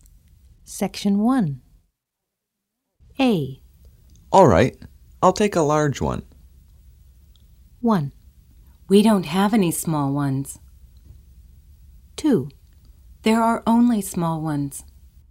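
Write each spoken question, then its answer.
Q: All right, I'll take a large one.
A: 1: We don't have any small ones.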